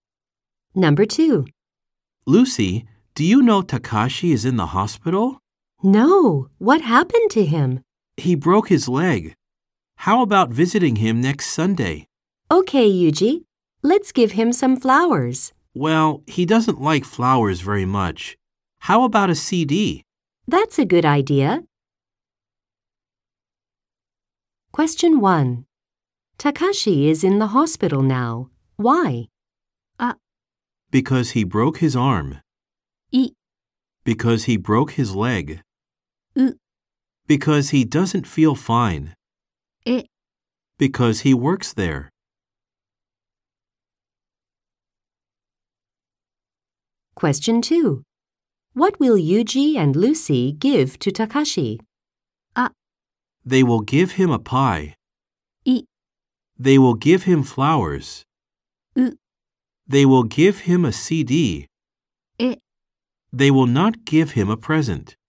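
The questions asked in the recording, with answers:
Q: Takashi is in the hospital now. Why?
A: い: Because he broke his leg.

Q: What will Yuji and Lucy give to Takashi?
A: う: They will give him a CD.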